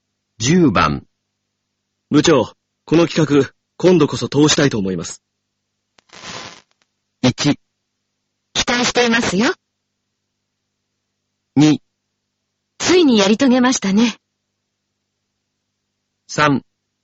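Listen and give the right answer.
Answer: 1: 期待していますよ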